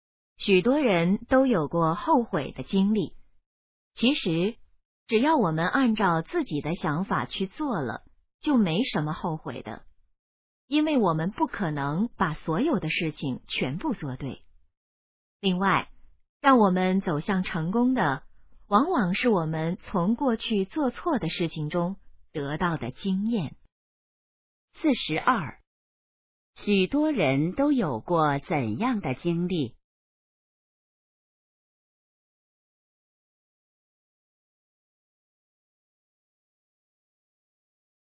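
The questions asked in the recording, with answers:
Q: 许多人都有过怎样的经历?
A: 后悔的经历

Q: 什么能帮助我们走向成功?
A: 从过去做错的事情中得到的经验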